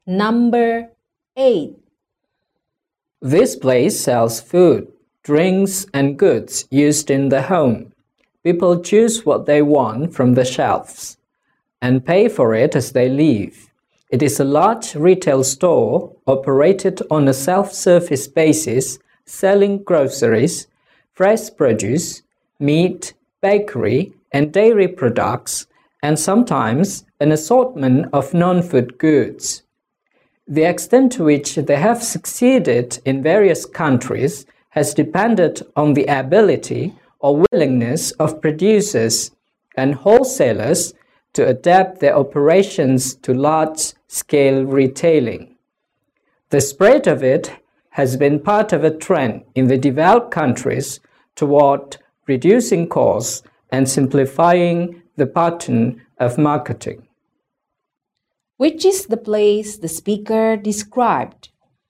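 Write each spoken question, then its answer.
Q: Which is the place the speaker described?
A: A supermarket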